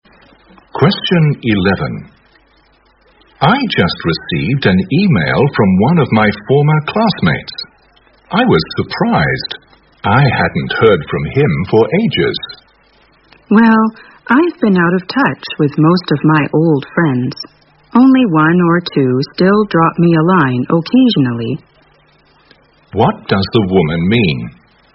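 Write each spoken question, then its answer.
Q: What does the woman mean?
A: She has lost touch with most of her old friends; only one or two still write to her now and then.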